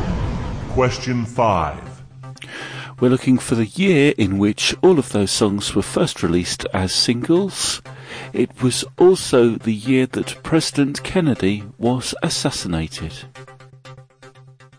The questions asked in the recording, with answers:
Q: We're looking for the year in which all of those songs were first released as singles.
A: 1963.